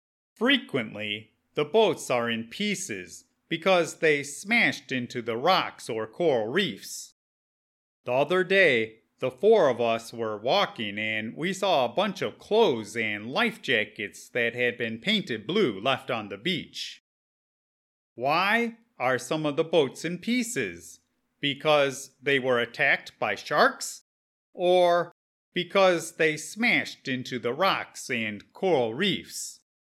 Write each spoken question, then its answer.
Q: Why are some of the boats in pieces?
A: The boats that we find are frequently in more than one piece because they smashed into the rocks and coral reefs.